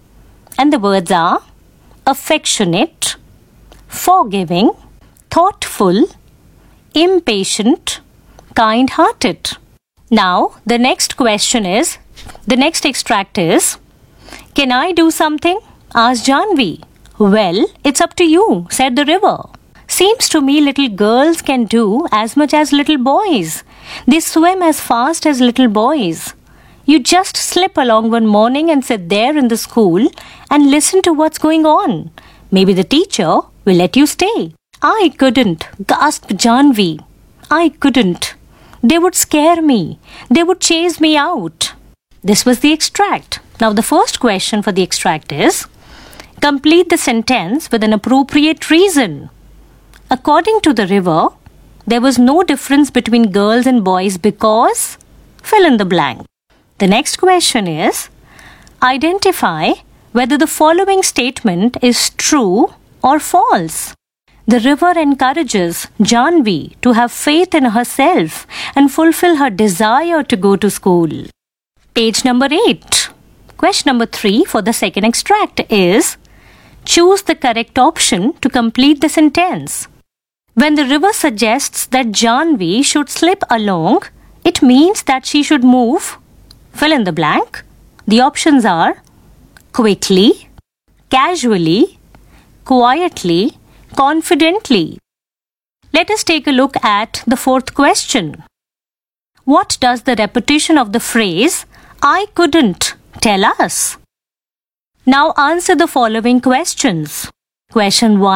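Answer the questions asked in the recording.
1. girls can do as much as boys and swim as fast as boys
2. True
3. quietly
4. Janvi is scared and unsure about going to school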